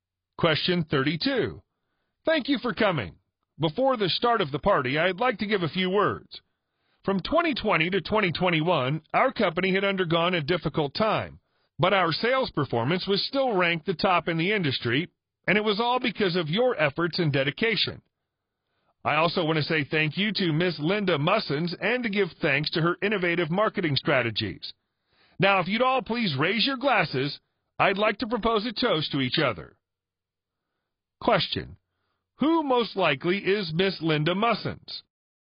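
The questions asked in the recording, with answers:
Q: Who most likely is Ms. Linda Mussens?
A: A marketing employee (she came up with innovative marketing strategies)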